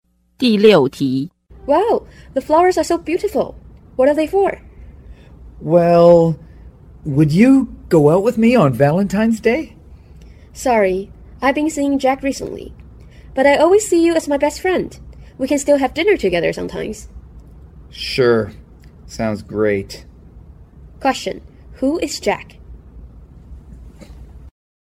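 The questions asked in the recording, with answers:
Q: Who is Jack?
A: The woman's boyfriend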